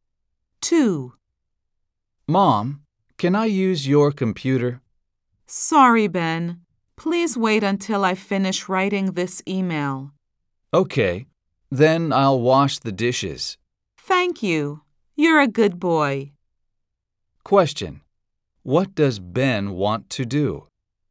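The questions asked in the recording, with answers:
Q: What does Ben want to do?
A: Use his mom's computer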